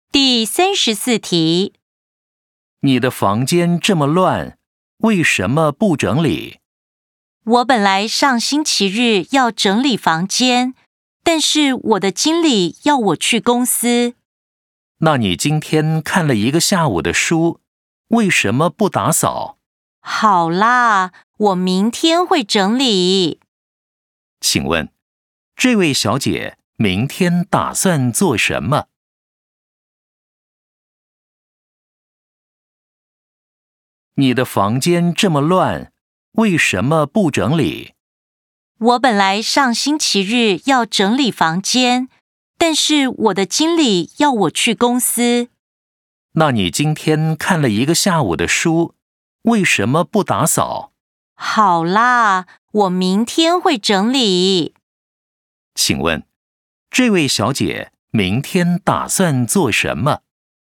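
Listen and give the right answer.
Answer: 整理房间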